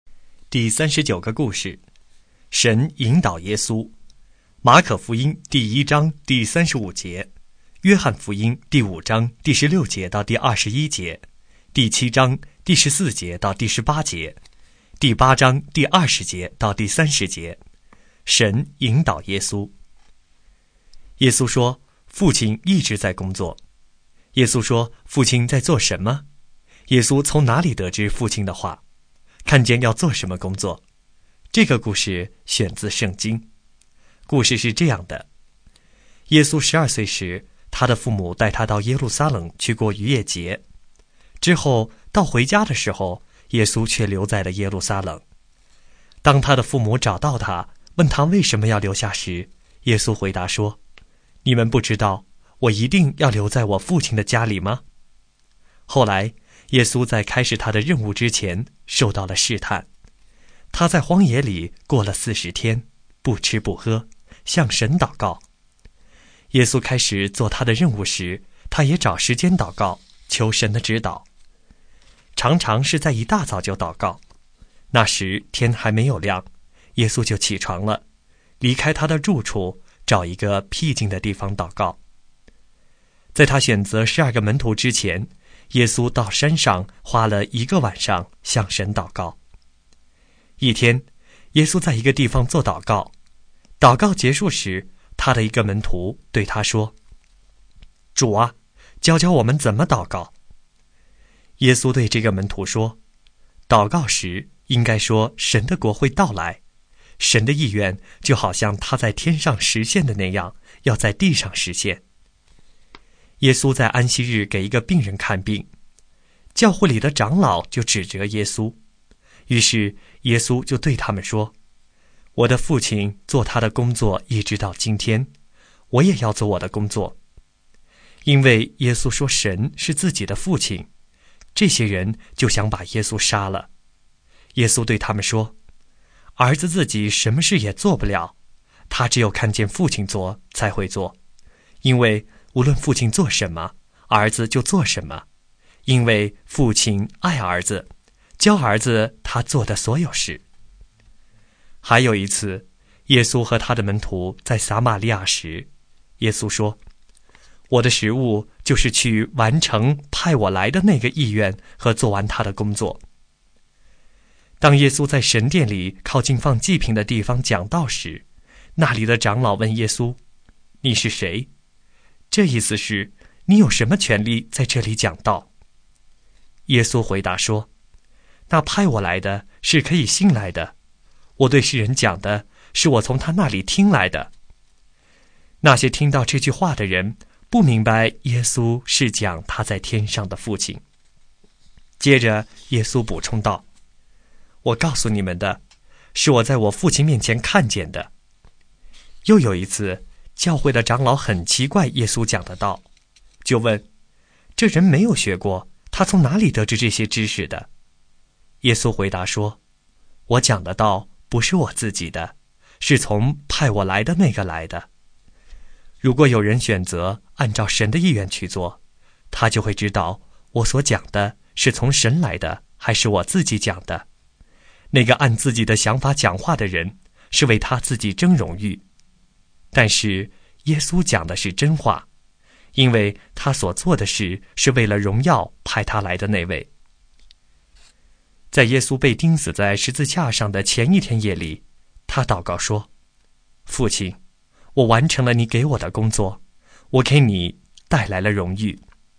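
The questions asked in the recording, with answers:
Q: 耶稣说,父亲在做什么?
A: 父亲一直在工作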